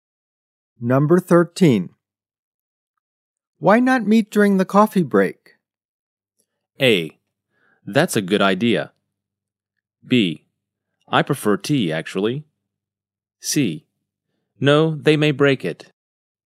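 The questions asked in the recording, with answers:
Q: Why not meet during the coffee break?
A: A: That's a good idea.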